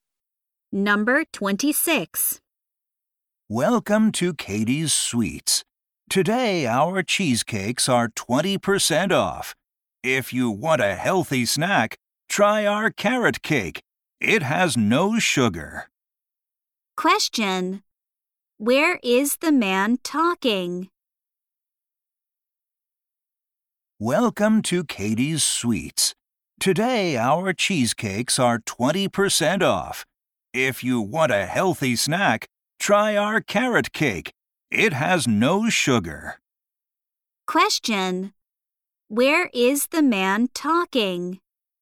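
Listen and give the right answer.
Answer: At a sweets shop (Katie's Sweets)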